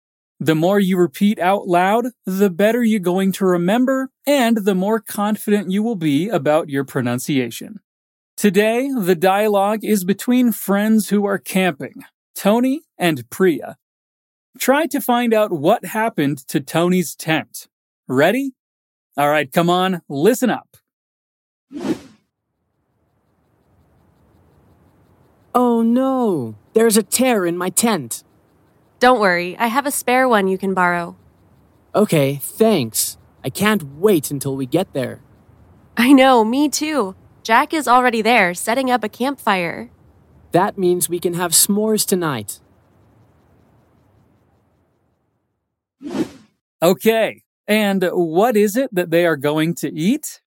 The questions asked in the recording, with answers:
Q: Try to find out what happened to Tony's tent.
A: Oh no, there's a tear in my tent." A tear is a rip, a slim hole on fabric.